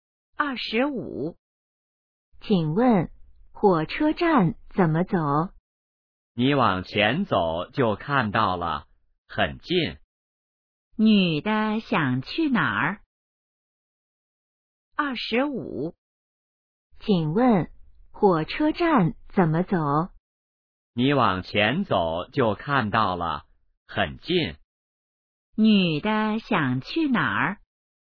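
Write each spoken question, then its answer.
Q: 女的想去哪儿?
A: 火车站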